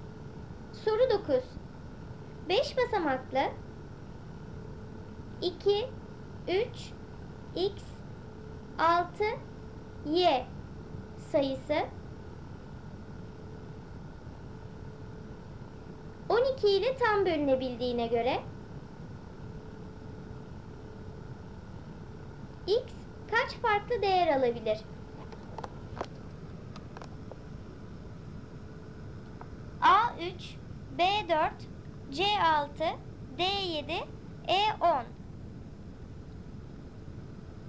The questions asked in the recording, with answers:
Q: X kaç farklı değer alabilir?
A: Doğru cevap E10.